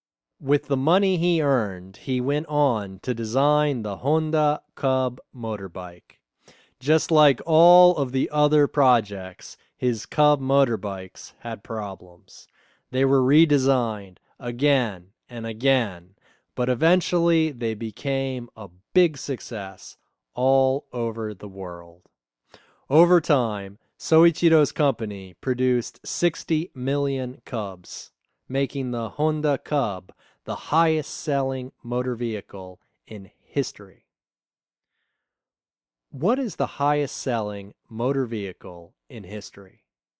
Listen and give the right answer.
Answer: The Honda Cub is the highest-selling vehicle in history.